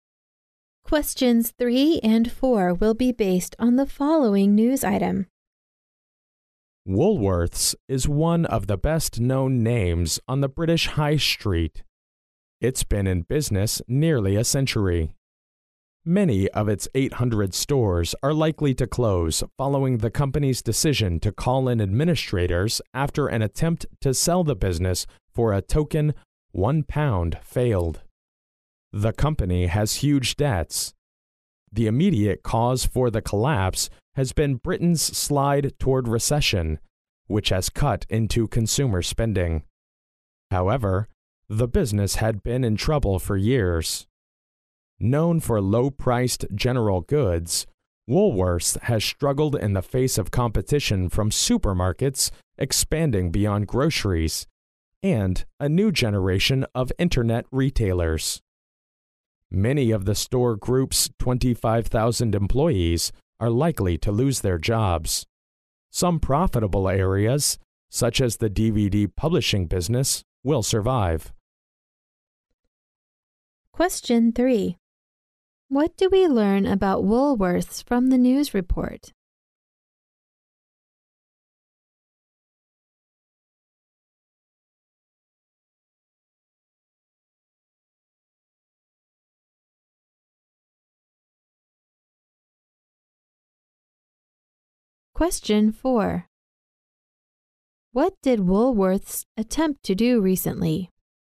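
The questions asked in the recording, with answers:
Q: What did Woolworths attempt to do recently?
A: Sell the business for a token £1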